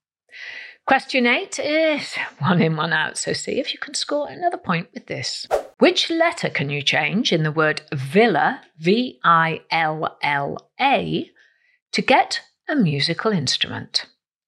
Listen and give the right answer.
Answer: Well, if you change the first letter L for a letter O to get the word viola, V-I-O-L-A, there is your musical instrument.